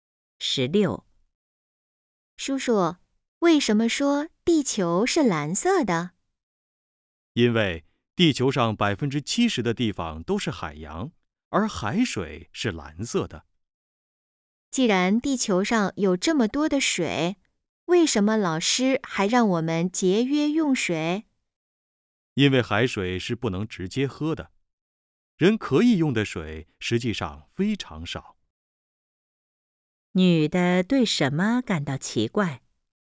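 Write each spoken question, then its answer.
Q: 女的对什么感到奇怪?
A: 地球上水这么多,为什么还要节约用水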